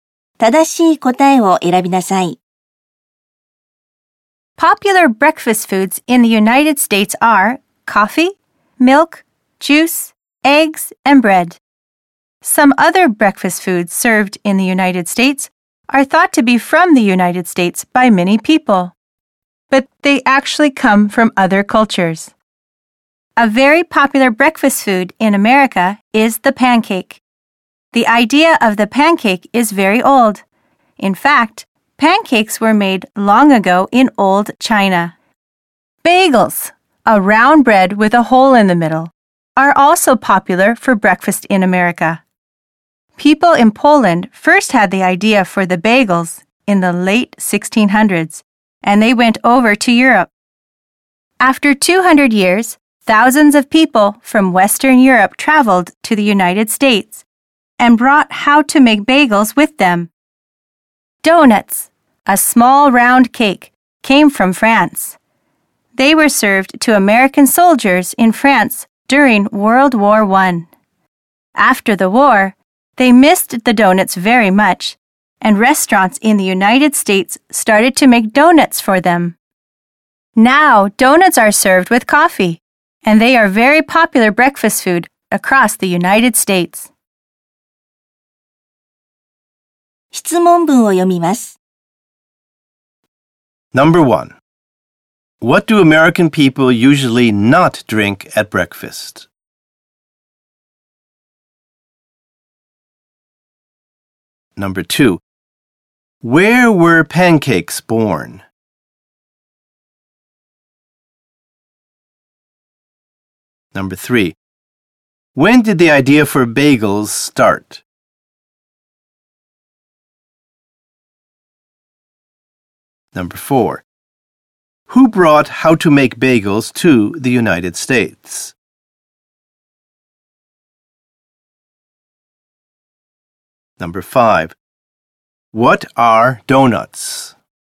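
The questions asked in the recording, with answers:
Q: Where were pancakes born?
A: In old China

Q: When did the idea for bagels start?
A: In the late 1600s

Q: Who brought how to make bagels to the United States?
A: People from Western Europe

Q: What are donuts?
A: A small round cake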